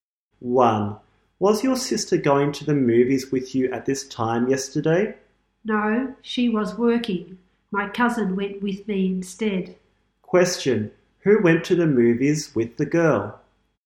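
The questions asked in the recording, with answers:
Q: Who went to the movies with the girl?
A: Her cousin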